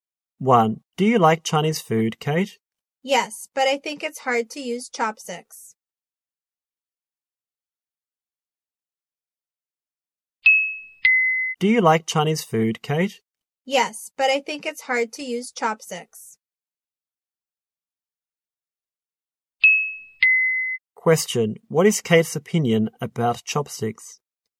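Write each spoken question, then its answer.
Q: Question, what is Kate's opinion about chopsticks?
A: It's hard to use chopsticks.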